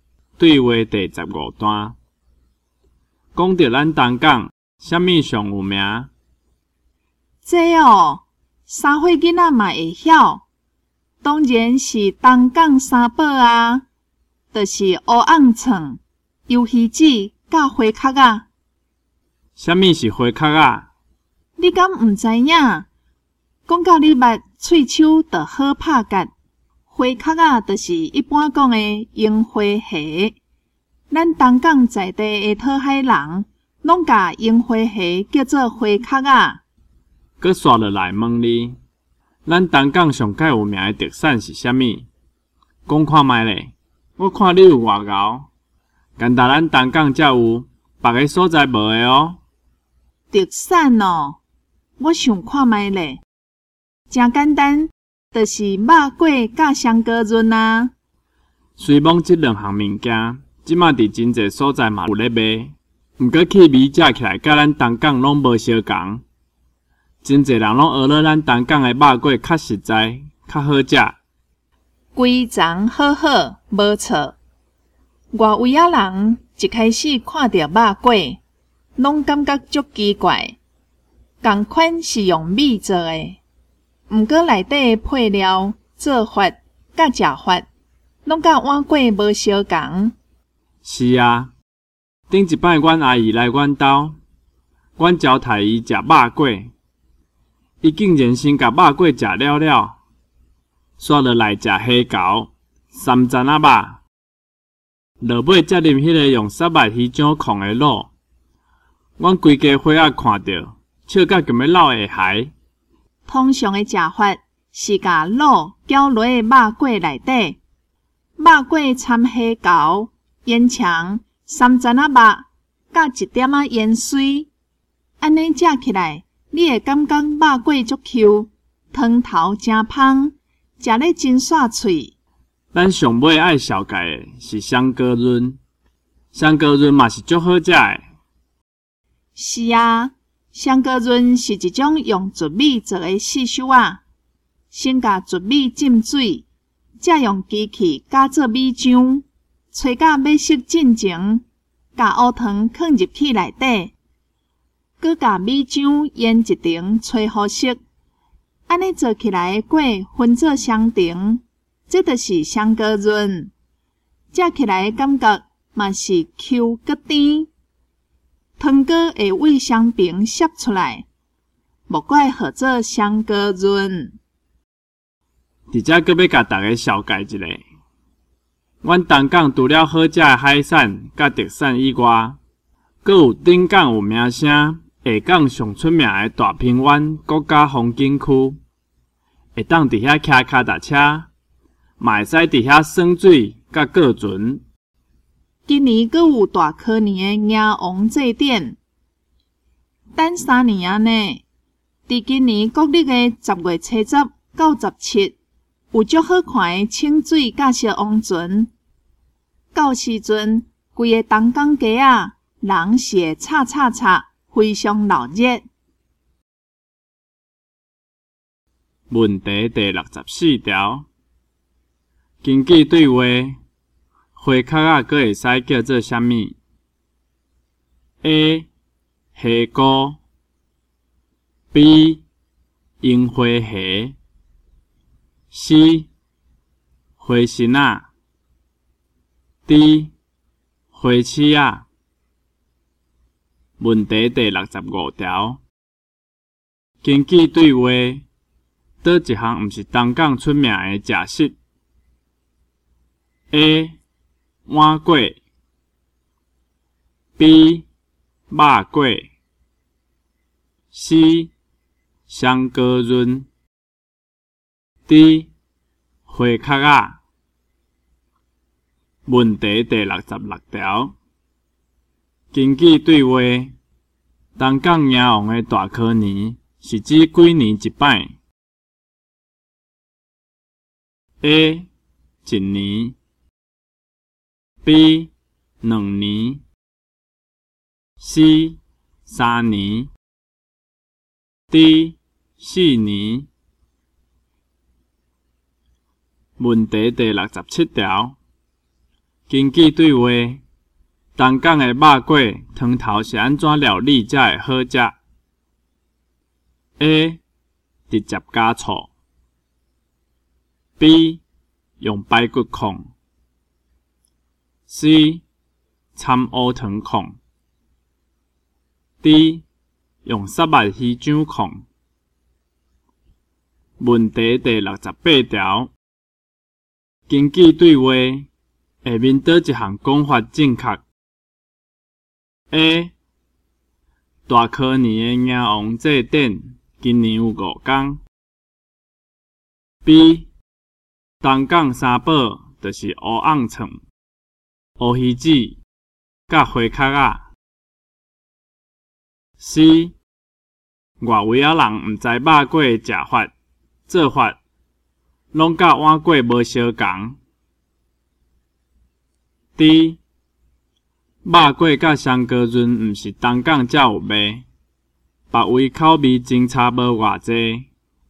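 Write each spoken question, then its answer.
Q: 根据对话。花壳啊,阁会使叫做啥物 ?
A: B: 樱花虾

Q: 根据对话,倒一项毋是东港出名的食食 ?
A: A: 碗粿

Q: 根据对话,东港鸭王的大科年是指几年一摆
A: C: 三年

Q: 根据对话,东港的肉粿汤头是安怎料理才会好吃?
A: D: 用沙白鱼酱控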